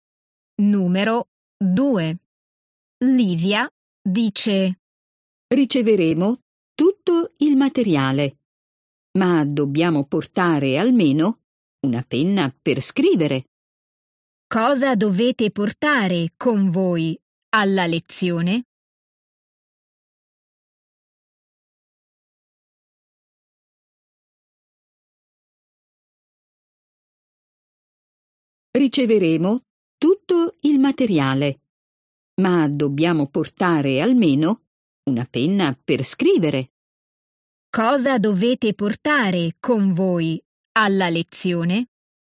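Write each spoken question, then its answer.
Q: Cosa dovete portare con voi alla lezione?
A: Una penna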